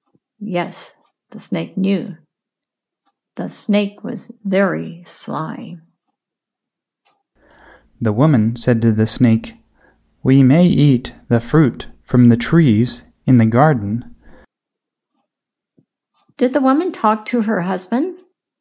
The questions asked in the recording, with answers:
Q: Did the woman talk to her husband?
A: No, the woman talked to the snake.